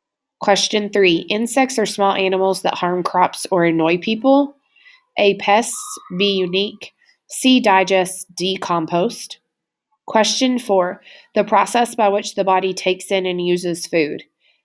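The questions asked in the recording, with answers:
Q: insects are small animals that harm crops or annoy people.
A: A: pests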